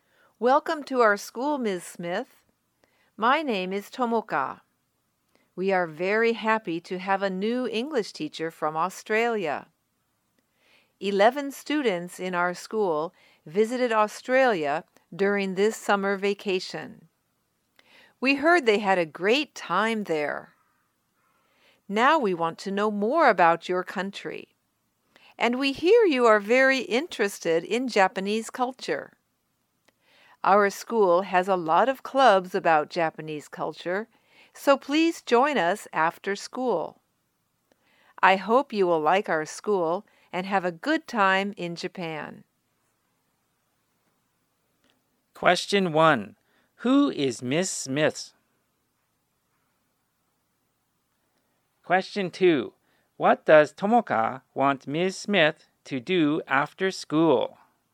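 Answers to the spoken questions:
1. A new English teacher from Australia.
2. Join the school's Japanese culture clubs.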